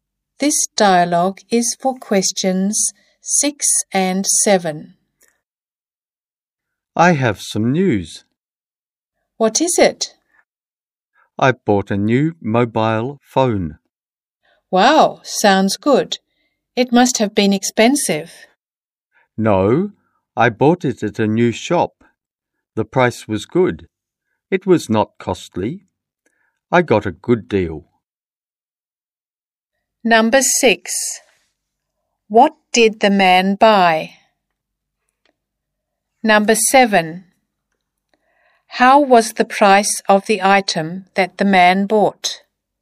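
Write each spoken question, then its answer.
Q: What did the man buy?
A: A new mobile phone

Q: How was the price of the item that the man bought?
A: Good, not costly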